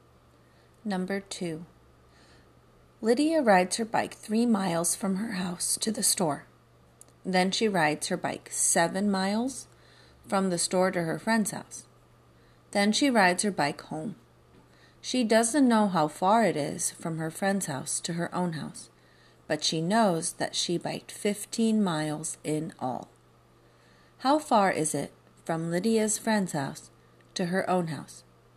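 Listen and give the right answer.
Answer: 5 miles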